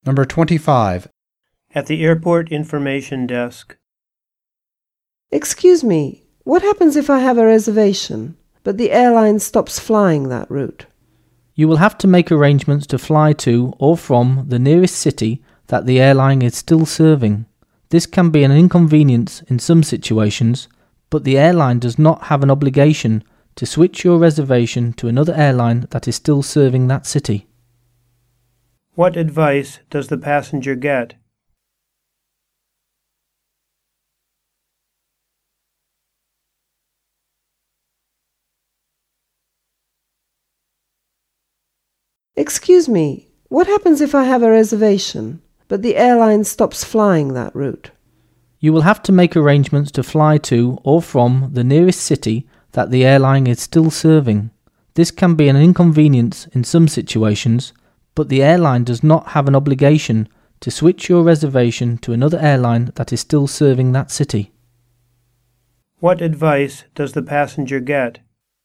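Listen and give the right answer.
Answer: To arrange to fly to or from the nearest city the airline still serves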